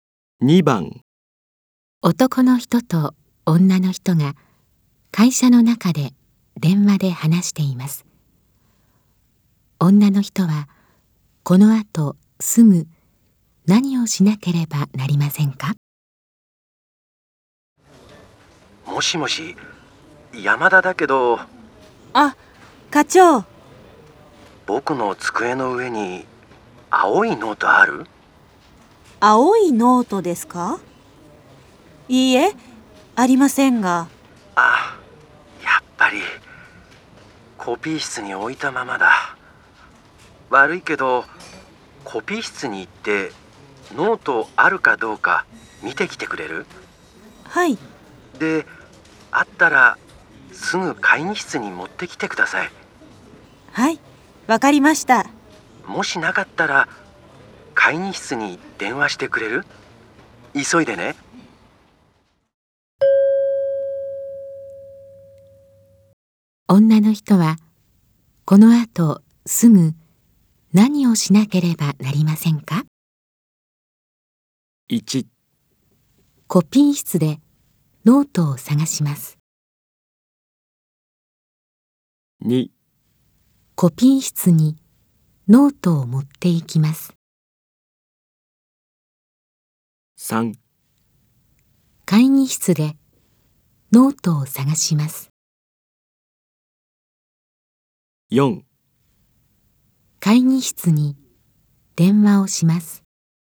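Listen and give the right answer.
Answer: 1: コピー室でノートを探します。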